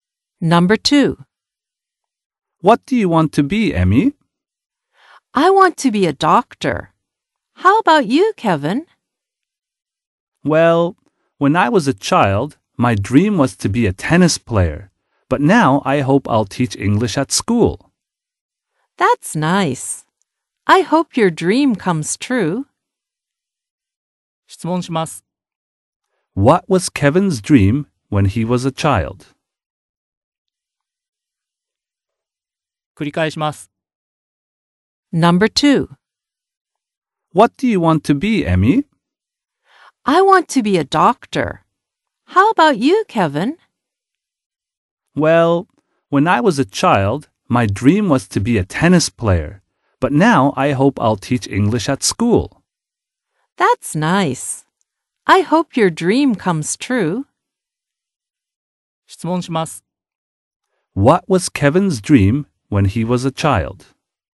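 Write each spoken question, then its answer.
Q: What was Kevin's dream when he was a child?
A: To be a tennis player.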